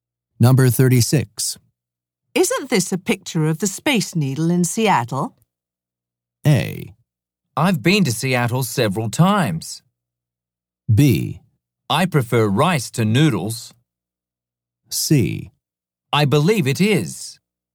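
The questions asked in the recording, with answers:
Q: Isn't this a picture of the Space Needle in Seattle?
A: C: I believe it is.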